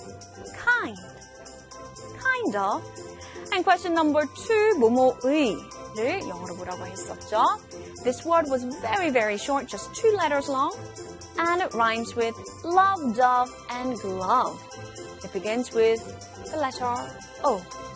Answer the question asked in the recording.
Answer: 뭐뭐의 is O-F, of.